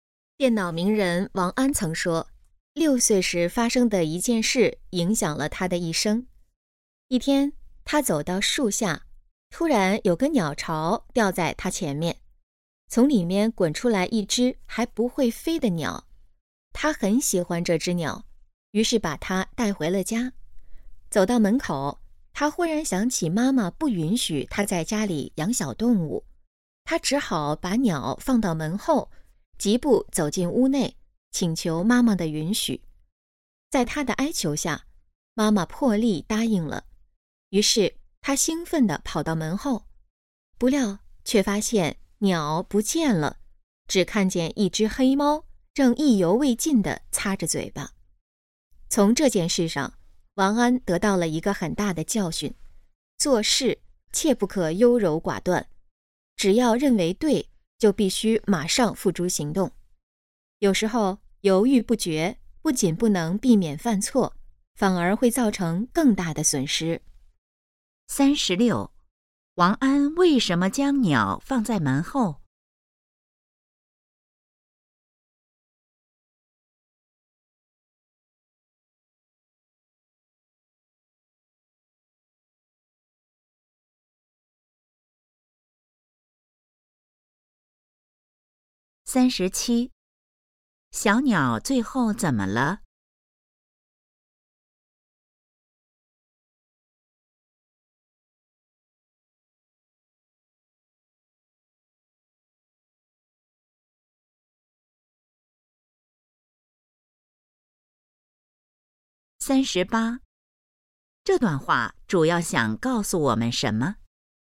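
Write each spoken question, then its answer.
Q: 王安为什么将鸟放在门后?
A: 妈妈不允许他在家里养小动物

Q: 小鸟最后怎么了?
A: 被黑猫吃了

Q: 这段话主要想告诉我们什么?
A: 做事不可优柔寡断,认为对就马上行动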